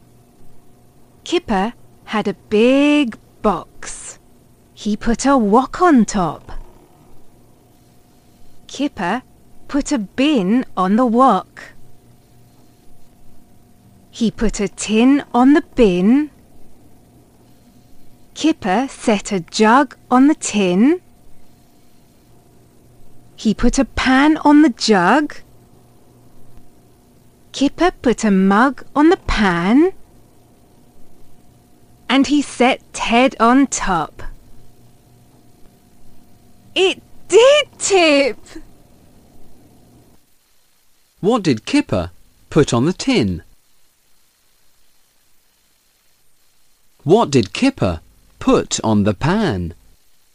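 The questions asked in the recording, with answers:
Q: What did Kipper put on the tin?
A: A jug

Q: What did Kipper put on the pan?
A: A mug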